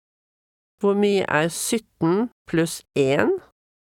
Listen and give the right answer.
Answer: 18.